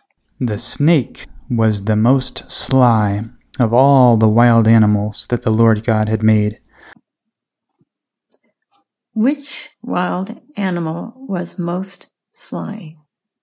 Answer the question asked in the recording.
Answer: The snake. The snake was the most sly of all the wild animals.